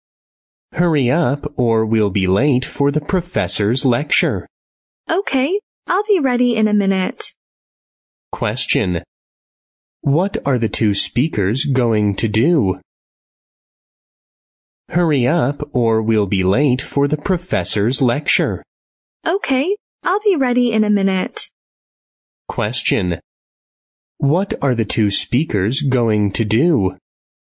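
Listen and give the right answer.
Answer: Attend the professor's lecture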